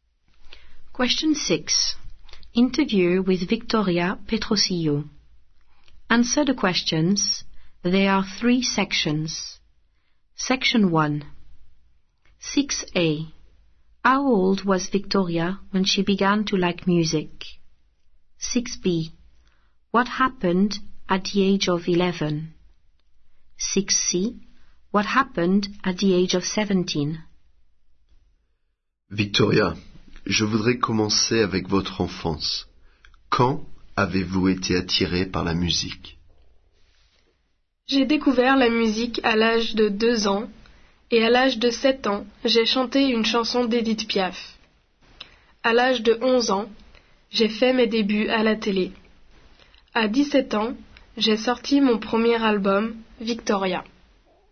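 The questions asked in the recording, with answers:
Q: What happened at the age of 11?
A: She made her TV debut

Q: What happened at the age of 17?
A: She released her first album, Victoria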